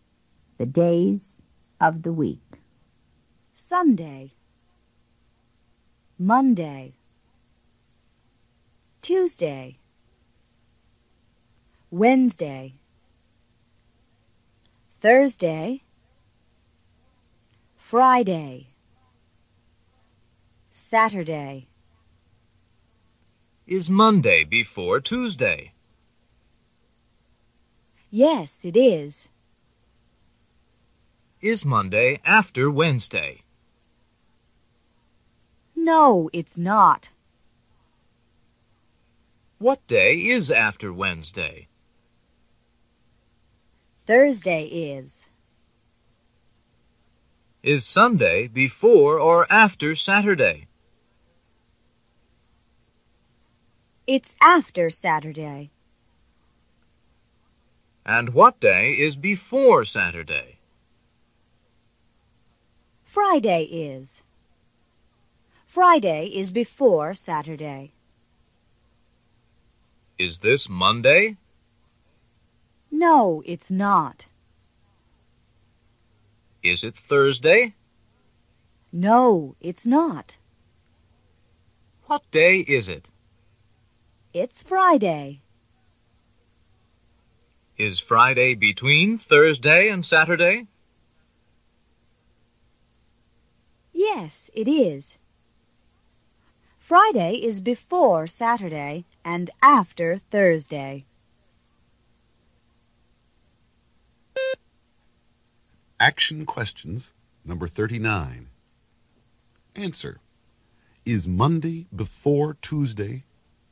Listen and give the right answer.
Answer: Yes, it is.